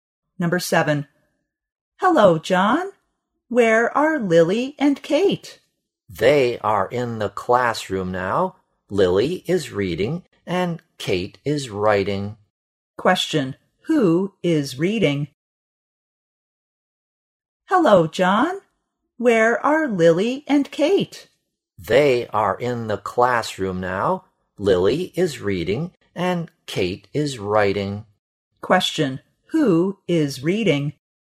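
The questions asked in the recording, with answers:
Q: who is reading?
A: Lily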